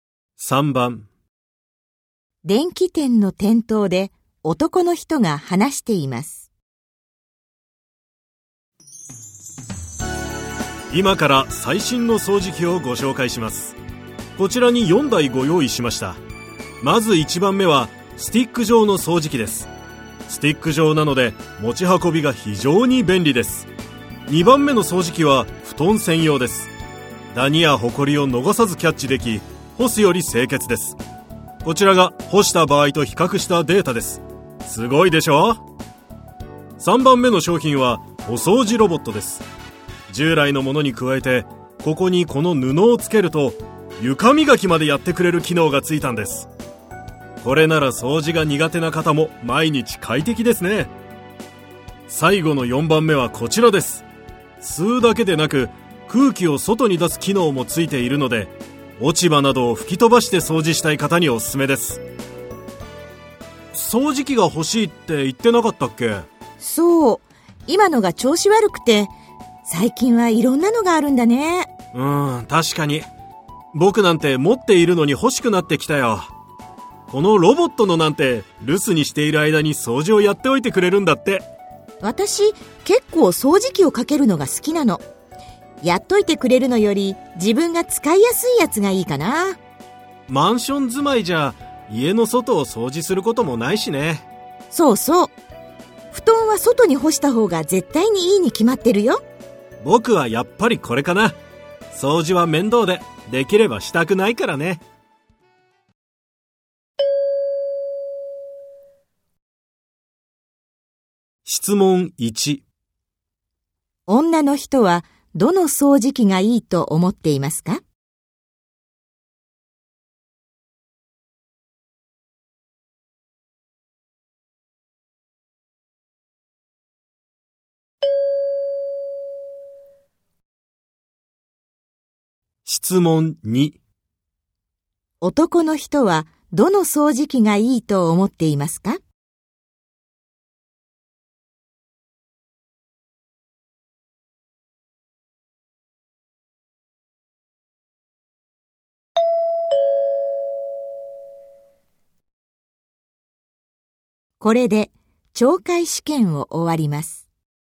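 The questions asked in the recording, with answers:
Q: 女の人はどの掃除機がいいと思っていますか?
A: 1番目: スティック状の掃除機

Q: 男の人はどの掃除機がいいと思っていますか?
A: 3番目: お掃除ロボット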